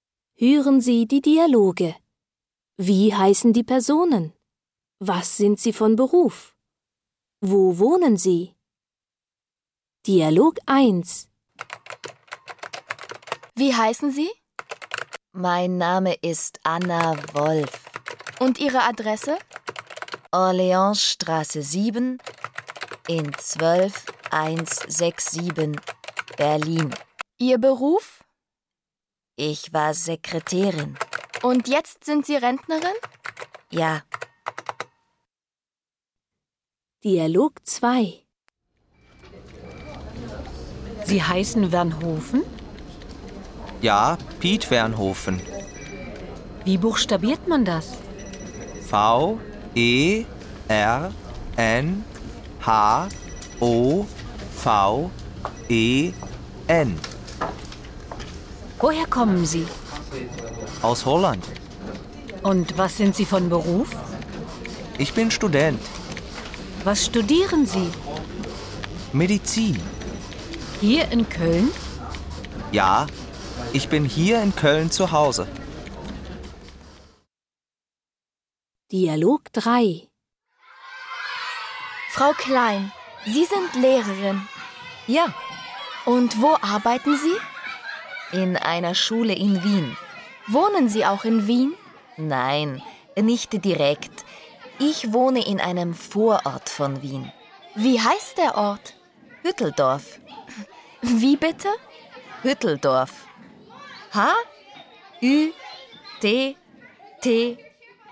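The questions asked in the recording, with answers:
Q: Wie heißen die Personen?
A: Anna Wolf, Piet Vernhoven, Frau Klein

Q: Was sind sie von Beruf?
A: Anna Wolf: Rentnerin (früher Sekretärin); Piet Vernhoven: Student (Medizin); Frau Klein: Lehrerin

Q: Wo wohnen sie?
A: Anna Wolf: Berlin; Piet Vernhoven: Köln; Frau Klein: Hütteldorf, ein Vorort von Wien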